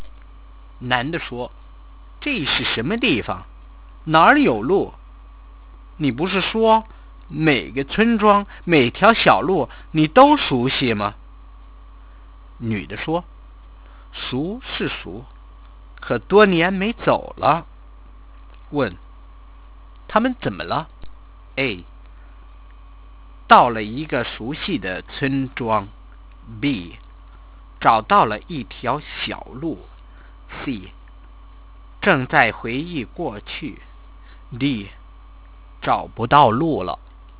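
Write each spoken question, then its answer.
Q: 他们怎么了?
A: D: 找不到路了。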